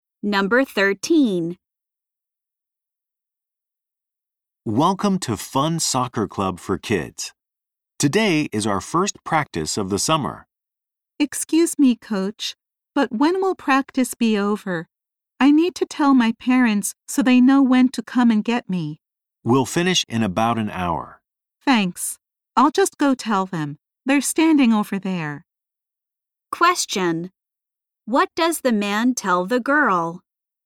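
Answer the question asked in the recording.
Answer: Practice will finish in about an hour.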